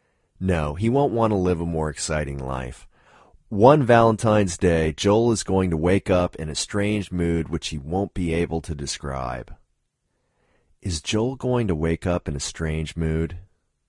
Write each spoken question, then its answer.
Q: Is Joel going to wake up in a strange mood?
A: Yes, Joel is going to wake up in a strange mood.